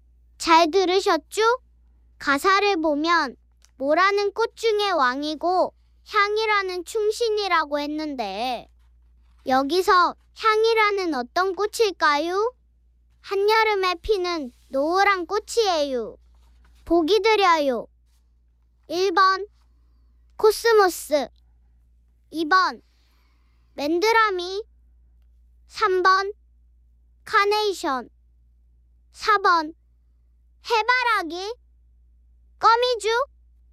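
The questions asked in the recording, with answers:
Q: 여기서 향이라는 어떤 꽃일까요?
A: 4번: 해바라기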